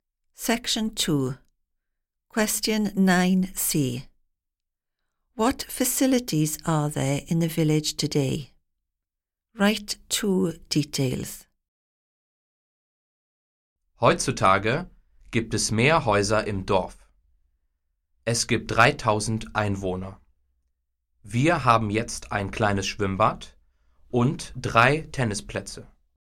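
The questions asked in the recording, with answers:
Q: What facilities are there in the village today?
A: A small swimming pool and three tennis courts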